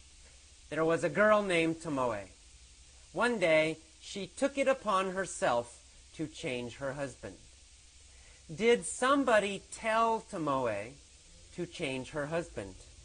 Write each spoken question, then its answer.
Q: Did somebody tell Tomoe to change her husband?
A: No, nobody told her. She took it upon herself.